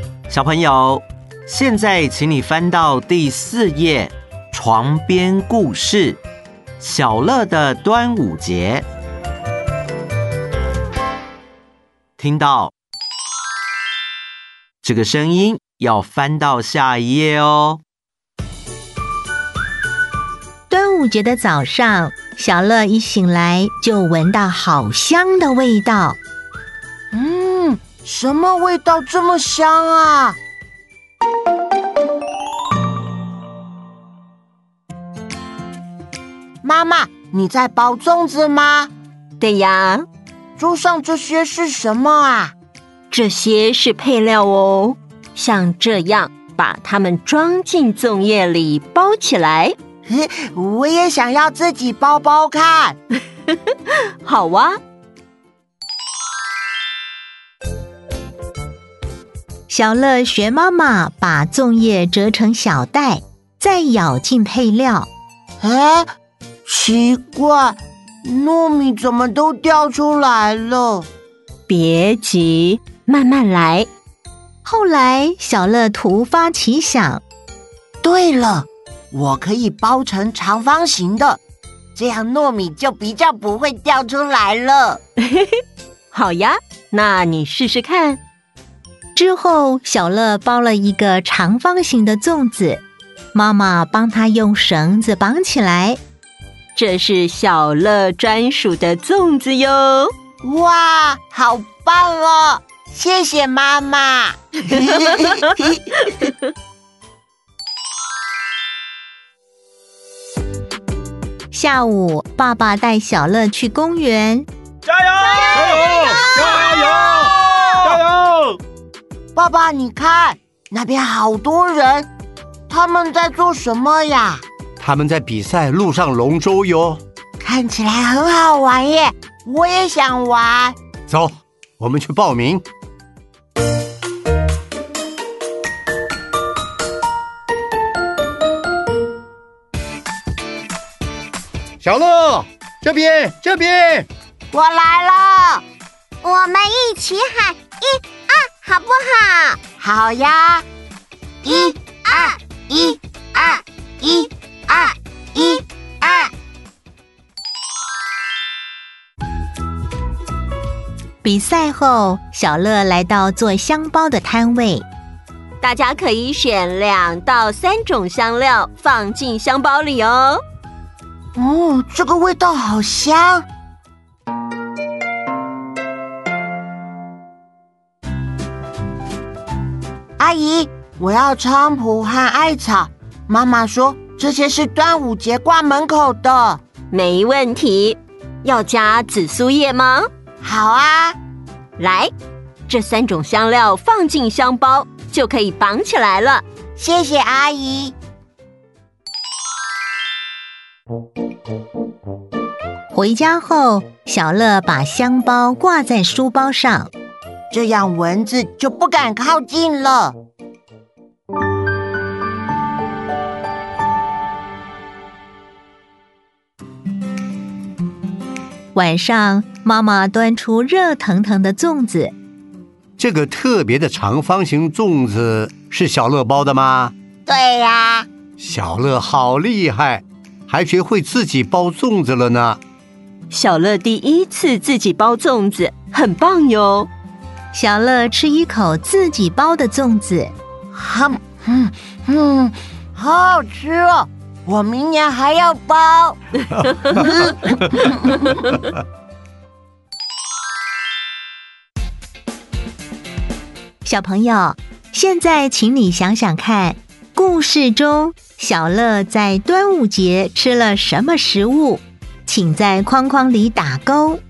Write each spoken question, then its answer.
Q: 小朋友,现在请你想想看,故事中小乐在端午节吃了什么食物,请在框框里打勾。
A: 粽子。